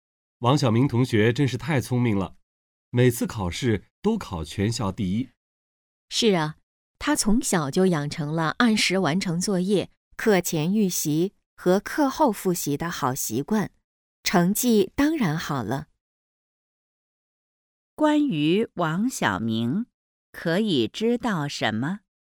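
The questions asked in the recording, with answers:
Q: 关于王小明,可以知道什么?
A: 学习习惯好,成绩好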